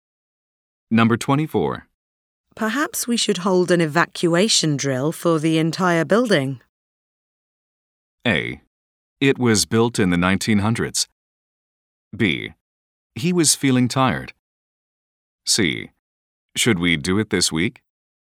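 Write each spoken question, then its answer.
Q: Perhaps we should hold an evacuation drill for the entire building.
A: C: Should we do it this week?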